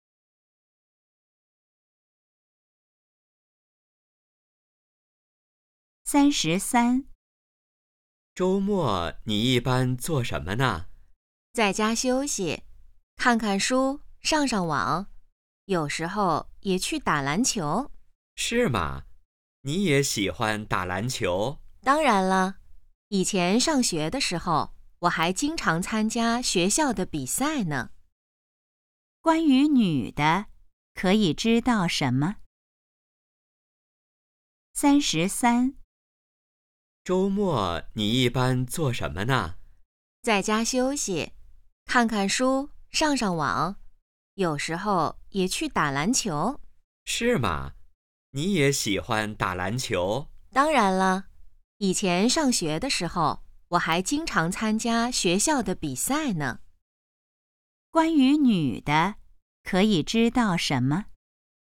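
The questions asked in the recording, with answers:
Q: 关于女的,可以知道什么?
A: 她喜欢打篮球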